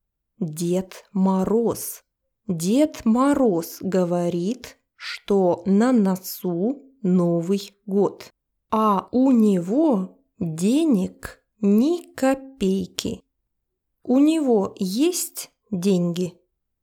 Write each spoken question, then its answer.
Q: У него есть деньги?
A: Нет, у него нет денег.